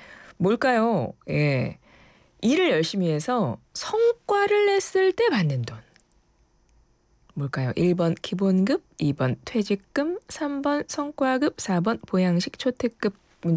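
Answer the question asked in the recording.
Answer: 3: 성과급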